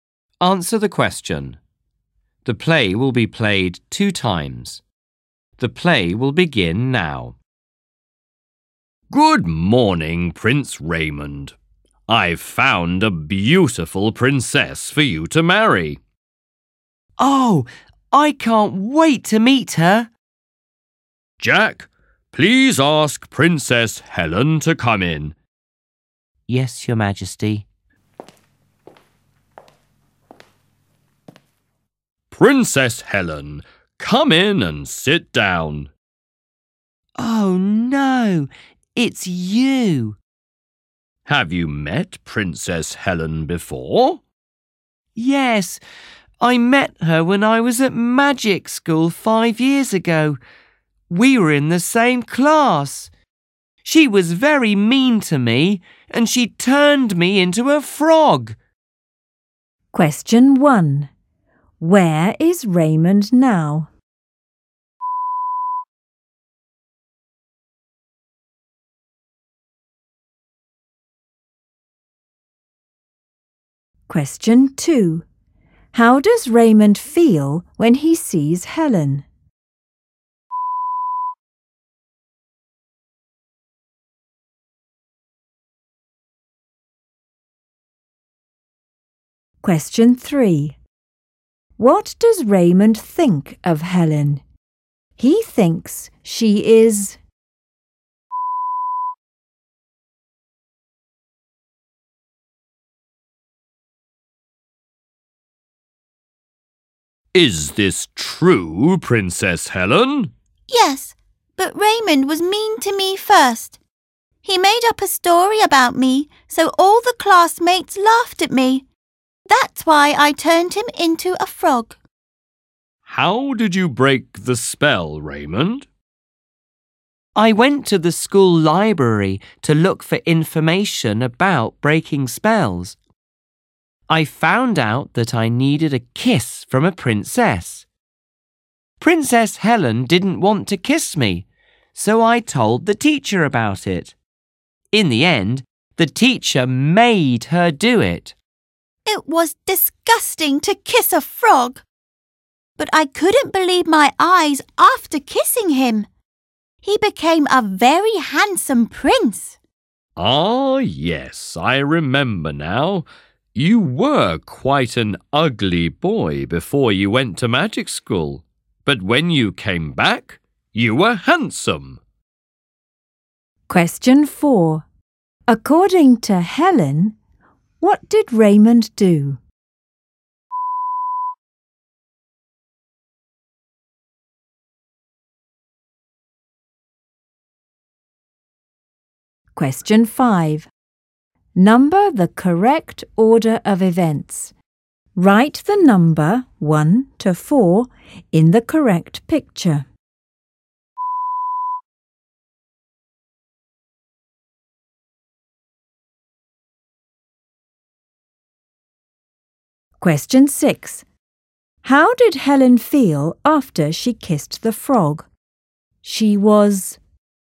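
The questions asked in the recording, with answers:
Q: Question 3. What does Raymond think of Helen? He thinks she is...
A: mean

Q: Question 4. According to Helen, what did Raymond do?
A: He made up a story about her, so the classmates laughed at her.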